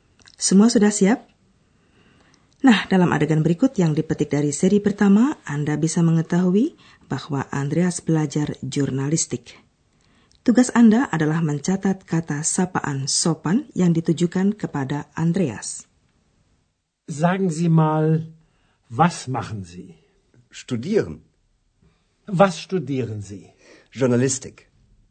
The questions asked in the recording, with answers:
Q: Tugas Anda adalah mencatat kata sapaan sopan yang ditujukan kepada Andreas.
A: Kata itu ialah Anda, Z.